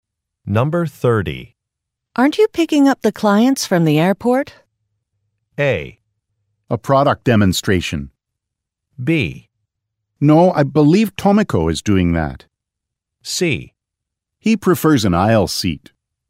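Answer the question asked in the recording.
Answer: B: No, I believe Tomiko is doing that.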